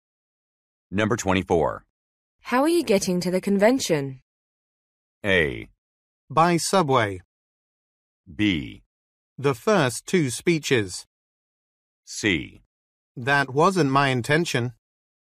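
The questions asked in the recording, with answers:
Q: How are you getting to the convention?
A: A: By subway.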